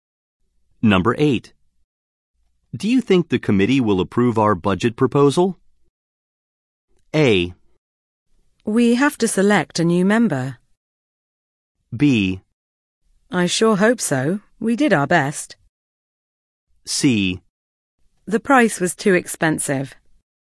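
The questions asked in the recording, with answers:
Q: Do you think the committee will approve our budget proposal?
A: B: I sure hope so. We did our best.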